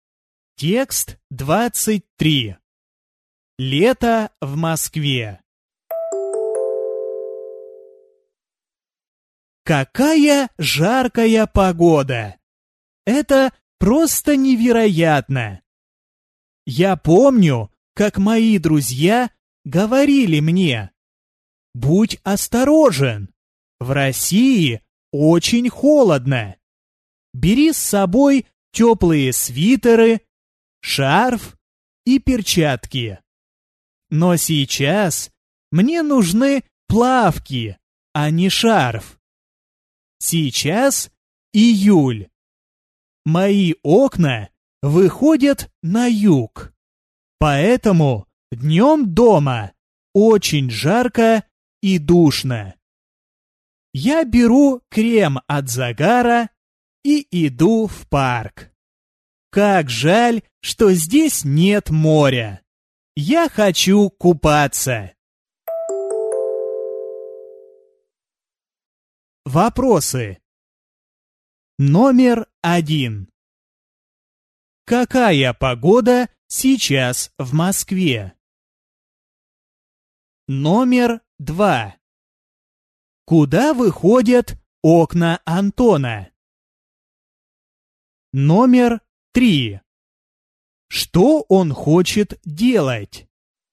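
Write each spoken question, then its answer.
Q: Какая погода сейчас в Москве?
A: Жаркая

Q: Куда выходят окна Антона?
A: На юг

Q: Что он хочет делать?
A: Купаться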